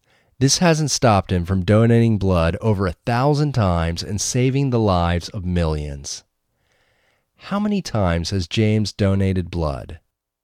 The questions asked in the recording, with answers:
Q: How many times has James donated blood?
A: James has donated blood over 1,000 times.